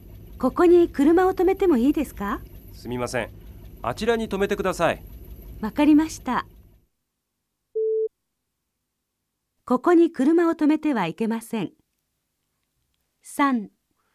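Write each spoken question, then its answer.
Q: ここに車を止めてはいけません。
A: 正しい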